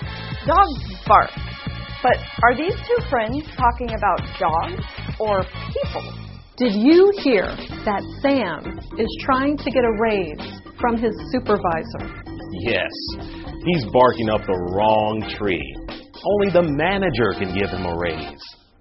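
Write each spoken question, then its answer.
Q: But are these two friends talking about dogs or people?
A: people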